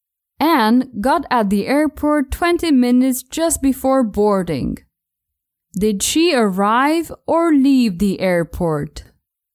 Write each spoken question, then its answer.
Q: Did she arrive or leave the airport?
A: She didn't leave the airport.